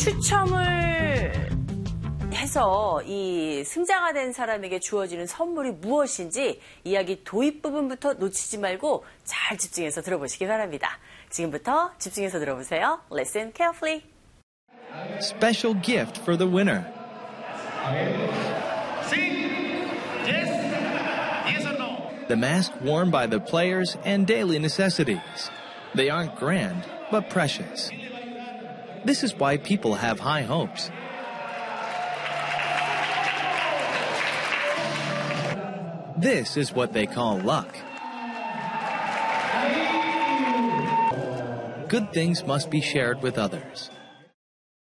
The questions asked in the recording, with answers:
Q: 추첨을 해서 이 승자가 된 사람에게 주어지는 선물이 무엇인지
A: 바로 이 선수들이 착용했던 가면과 그리고 생활 필수품이었죠.